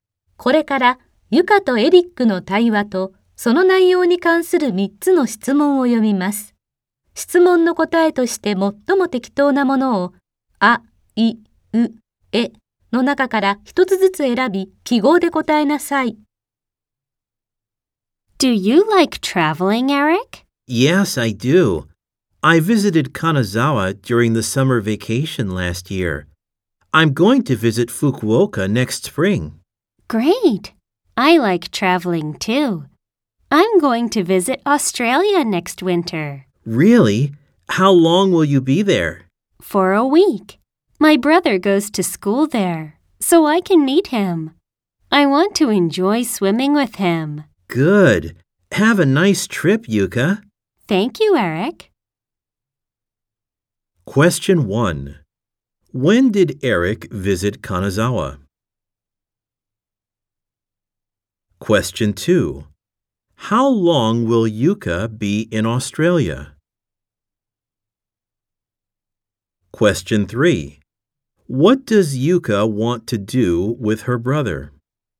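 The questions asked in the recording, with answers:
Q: When did Eric visit Kanazawa?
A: During the summer vacation last year

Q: How long will Yuka be in Australia?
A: For a week

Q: What does Yuka want to do with her brother?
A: Enjoy swimming with him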